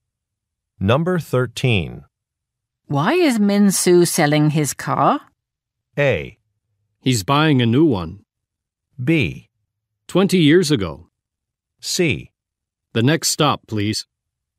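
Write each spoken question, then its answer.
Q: Why is Min Soo selling his car?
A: A: He's buying a new one.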